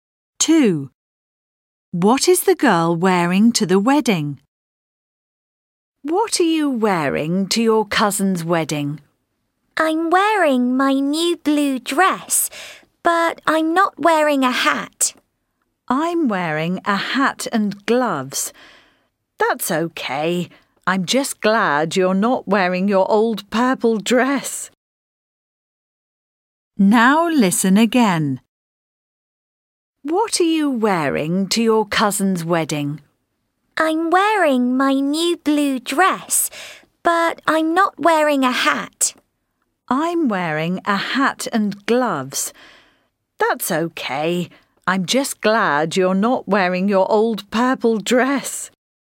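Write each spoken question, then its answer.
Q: What is the girl wearing to the wedding?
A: Her new blue dress, no hat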